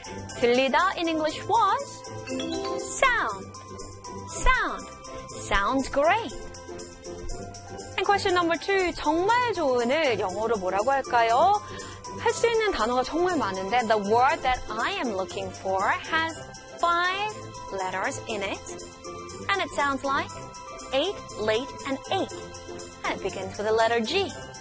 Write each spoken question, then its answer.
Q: 정말 좋은을 영어로 뭐라고 할까요?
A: 정말 좋은 영어로는 great. Great.